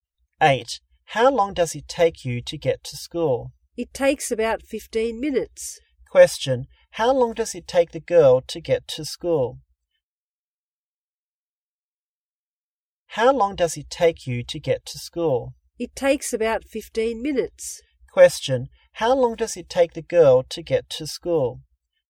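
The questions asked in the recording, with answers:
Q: how long does it take the girl to get to school?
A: About 15 minutes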